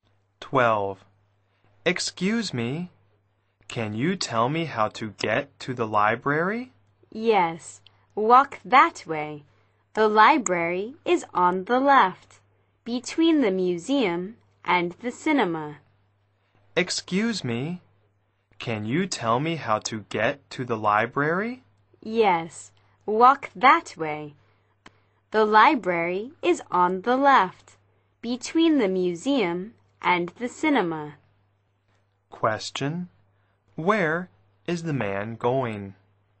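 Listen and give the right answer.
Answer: The library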